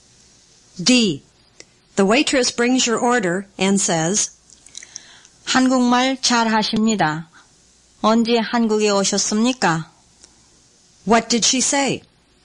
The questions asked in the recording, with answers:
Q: What did she say?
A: She said, you speak Korean well.